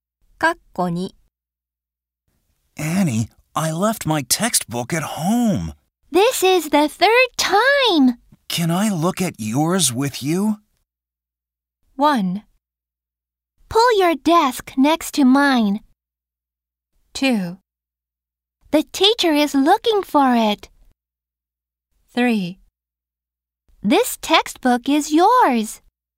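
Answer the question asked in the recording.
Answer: 1: Pull your desk next to mine.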